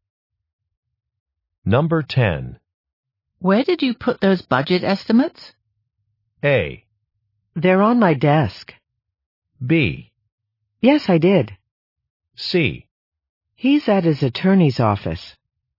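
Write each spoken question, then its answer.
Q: Where did you put those budget estimates?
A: A: They're on my desk.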